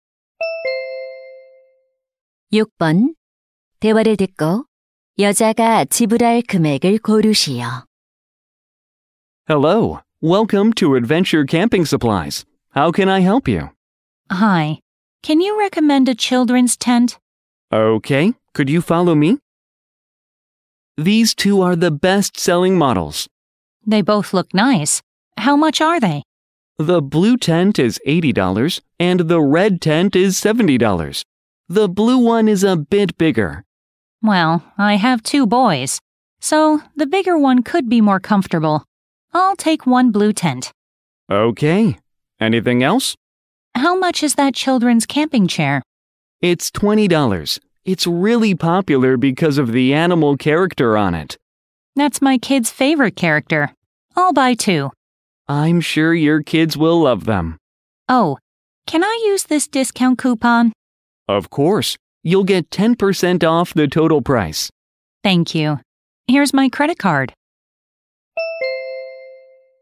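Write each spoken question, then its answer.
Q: 대화를 듣고 여자가 지불할 금액을 고르시오.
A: 108달러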